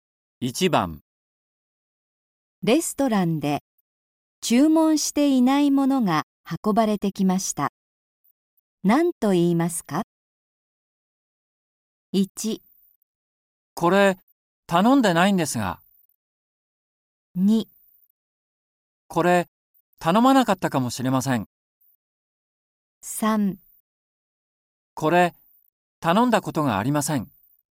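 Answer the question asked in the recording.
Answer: 1: これ頼んでないんですが。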